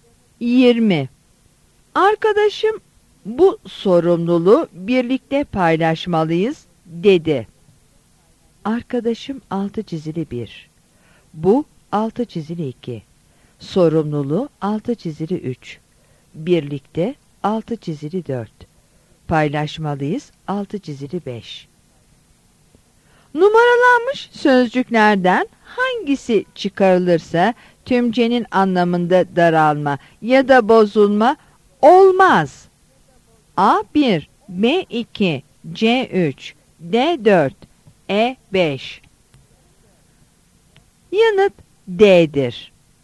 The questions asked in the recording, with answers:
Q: Numaralanmış sözcüklerden hangisi çıkarılırsa tümcenin anlamında daralma ya da bozulma olmaz.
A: Yanıt D'dir.